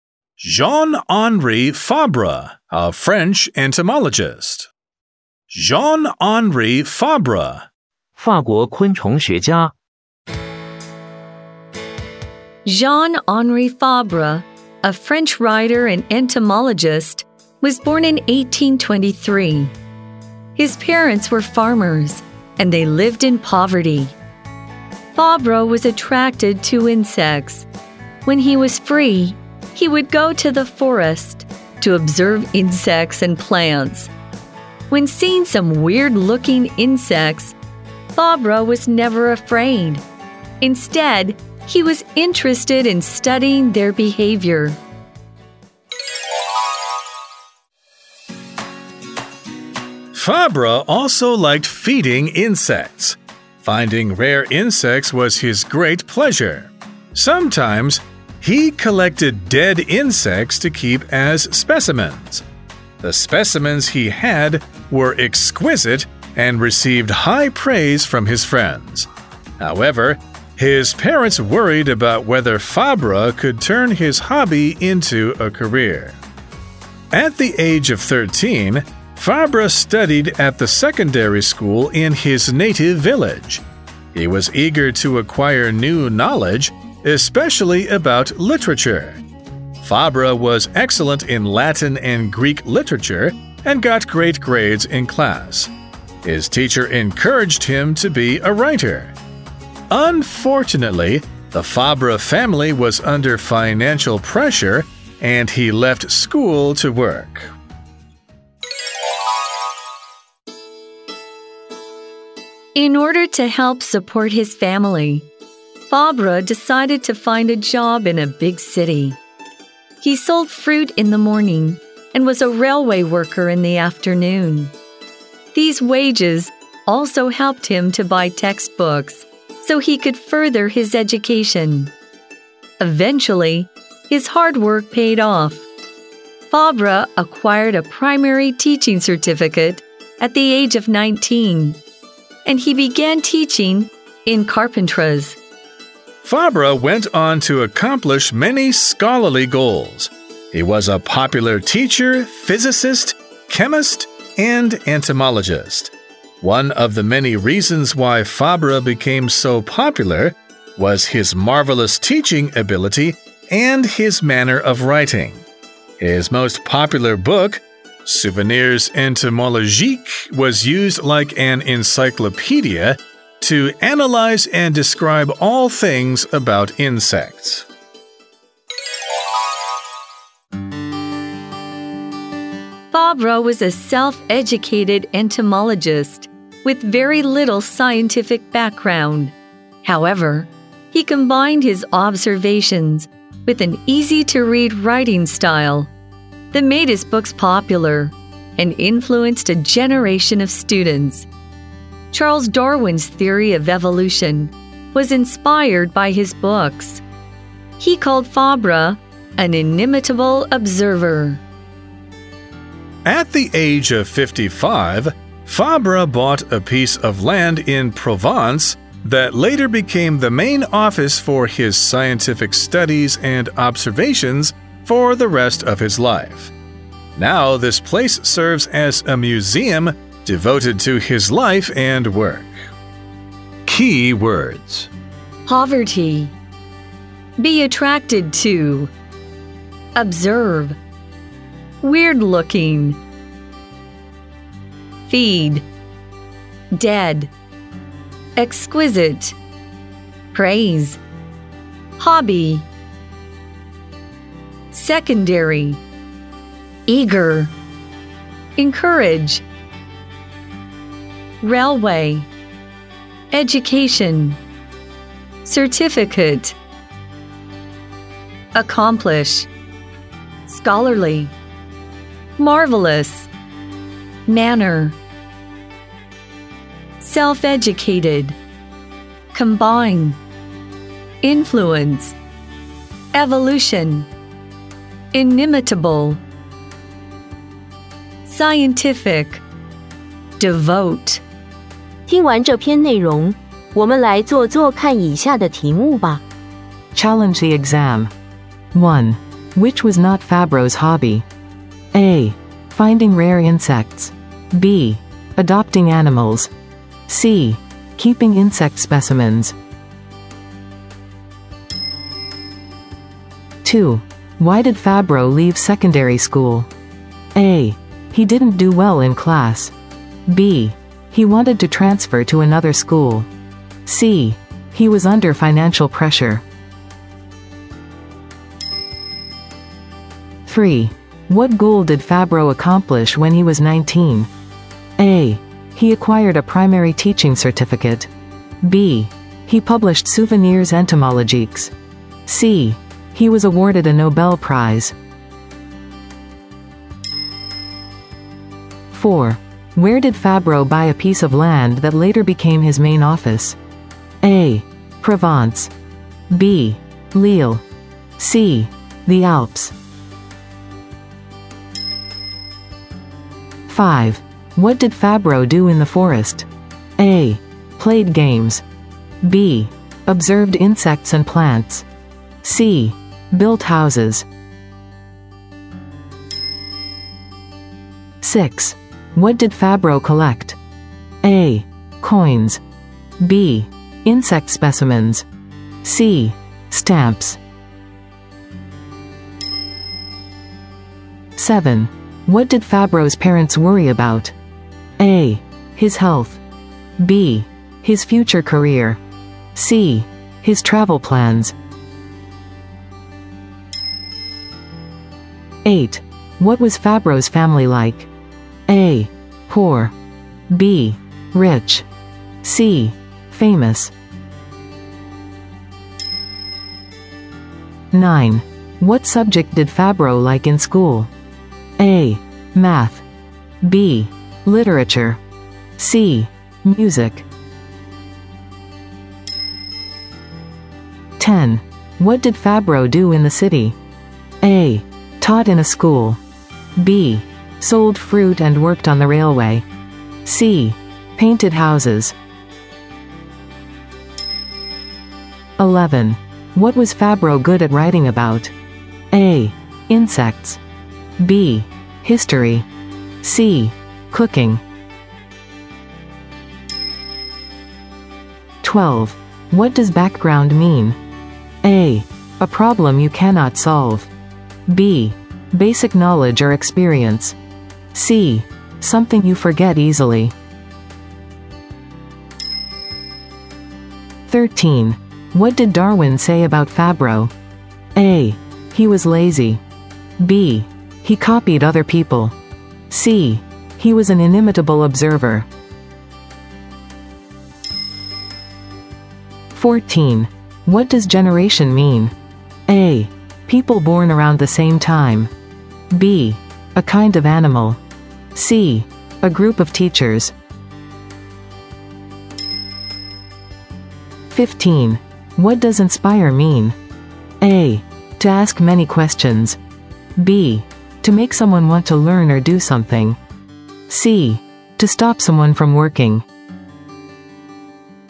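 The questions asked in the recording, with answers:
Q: Which was not Fabro's hobby?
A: B: Adopting animals.

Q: Why did Fabro leave secondary school?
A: C: He was under financial pressure.

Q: What goal did Fabro accomplish when he was 19?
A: A: He acquired a primary teaching certificate.

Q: Where did Fabro buy a piece of land that later became his main office?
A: A: Provence.

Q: What did Fabro do in the forest?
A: B: Observed insects and plants.

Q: What did Fabro collect?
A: B: Insect specimens.

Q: What did Fabro's parents worry about?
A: B: His future career.

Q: What was Fabro's family like?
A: A: Poor.

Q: What subject did Fabro like in school?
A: B: Literature.

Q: What did Fabro do in the city?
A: B: Sold fruit and worked on the railway.

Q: What was Fabro good at writing about?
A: A: Insects.

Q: What did Darwin say about Fabro?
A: C: He was an inimitable observer.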